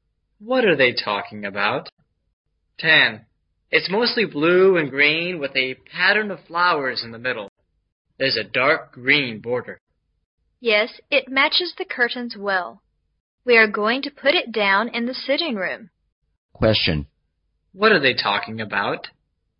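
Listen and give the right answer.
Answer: A carpet for the sitting room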